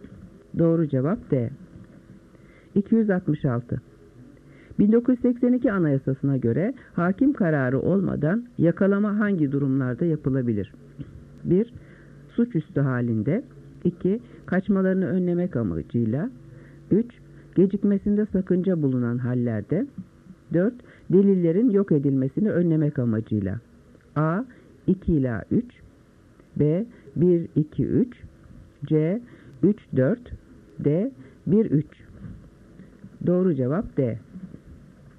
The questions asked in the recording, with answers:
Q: 1982 Anayasası'na göre hakim kararı olmadan yakalama hangi durumlarda yapılabilir?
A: Doğru cevap D.